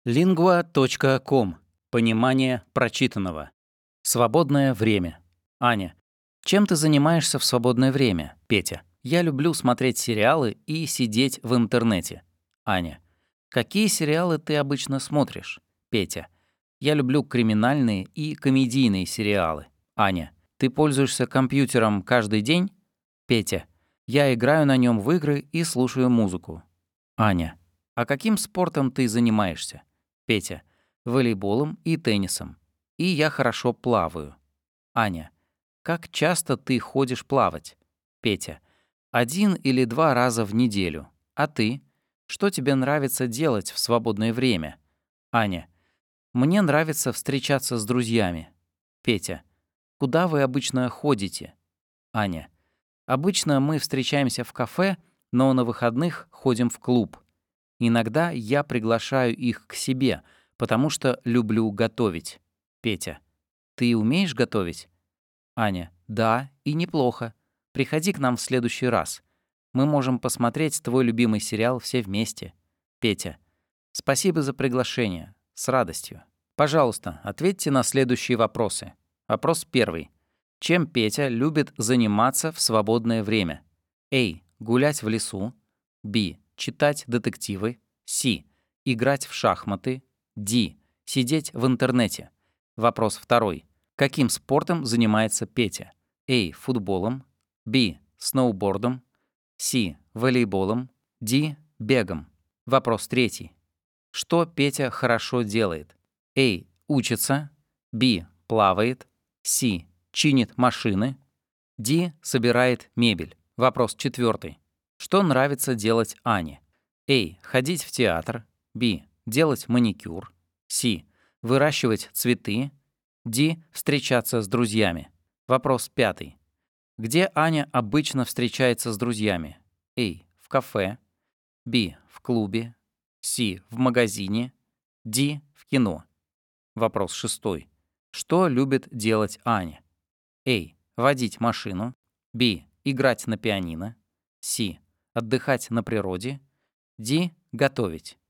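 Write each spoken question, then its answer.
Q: Чем Петя любит заниматься в свободное время?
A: Д: Сидеть в интернете

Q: Каким спортом занимается Петя?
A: С: Волейболом

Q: Что Петя хорошо делает?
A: Б: Плавает

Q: Что нравится делать Ане?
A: Д: Встречаться с друзьями

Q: Где Аня обычно встречается с друзьями?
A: А: В кафе

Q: Что любит делать Аня?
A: Д: Готовить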